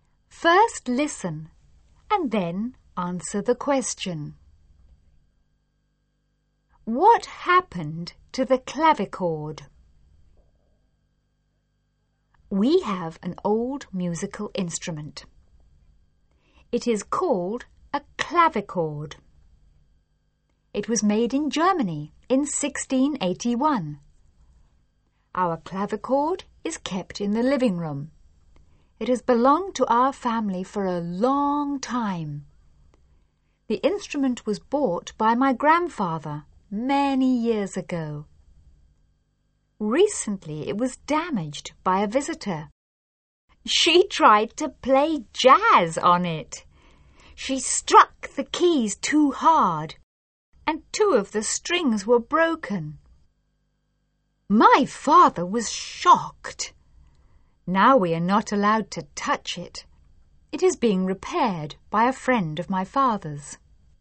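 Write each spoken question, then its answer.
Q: What happened to the clavichord?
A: It was damaged by a visitor who played jazz on it too hard and broke two strings; now it is being repaired.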